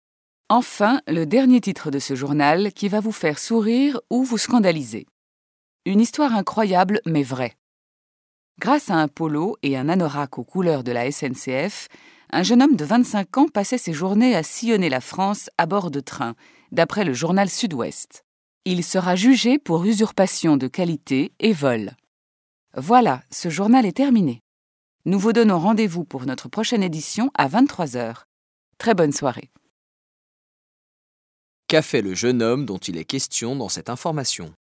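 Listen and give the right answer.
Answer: Il s'est fait passer pour un employé de la SNCF (avec un polo et un anorak SNCF) pour voyager en train partout en France.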